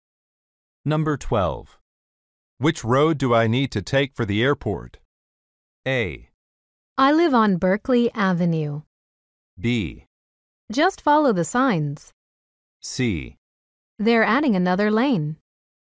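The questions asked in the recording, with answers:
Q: Which road do I need to take for the airport?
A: B: Just follow the signs.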